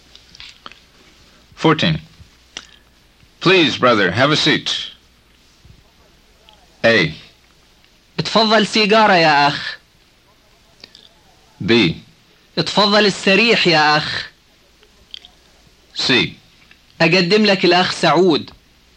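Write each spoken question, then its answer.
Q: Please, brother, have a seat.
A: B: اتفضل السريح يا أخ.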